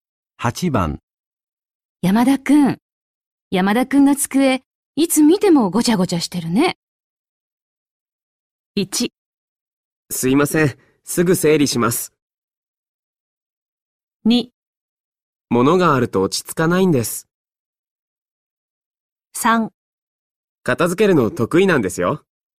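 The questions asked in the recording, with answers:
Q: 山田くんが机、いつ見てもごちゃごちゃしてるね。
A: 1: すいません。すぐ整理します。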